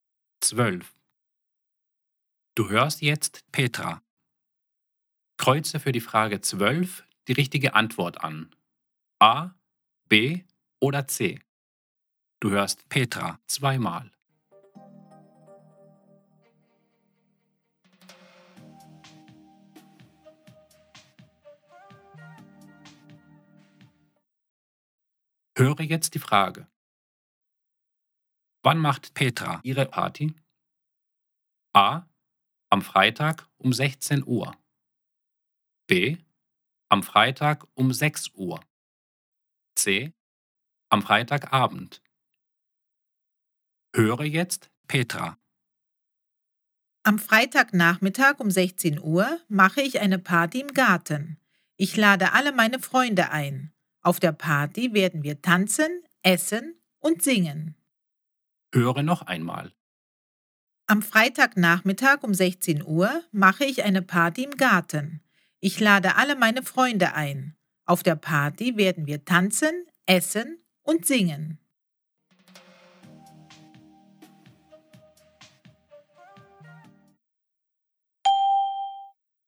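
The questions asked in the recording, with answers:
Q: Wann macht Petra ihre Party?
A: A: Am Freitag um 16 Uhr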